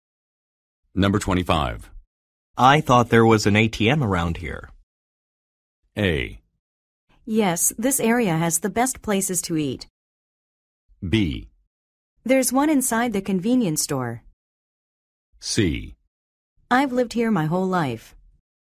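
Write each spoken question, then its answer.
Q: I thought there was an ATM around here.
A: B: There's one inside the convenience store.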